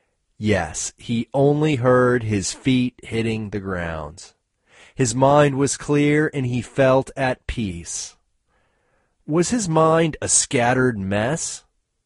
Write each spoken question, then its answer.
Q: Was his mind a scattered mess?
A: No, his mind wasn't a scattered mess.